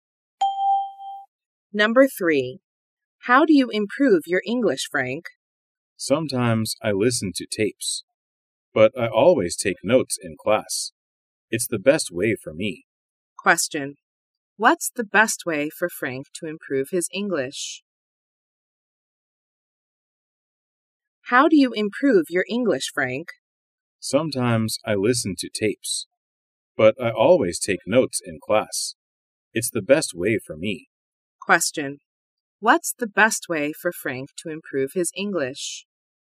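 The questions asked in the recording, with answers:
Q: What's the best way for Frank to improve his English?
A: Taking notes in class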